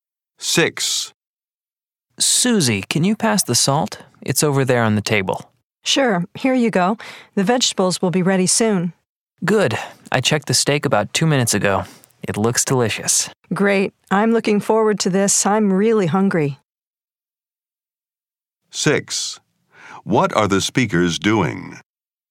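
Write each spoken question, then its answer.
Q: What are the speakers doing?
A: Cooking dinner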